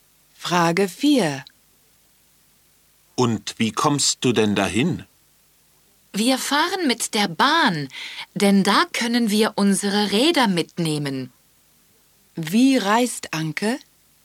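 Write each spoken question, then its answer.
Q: Wie reist Anke?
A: Mit der Bahn (mit Rädern)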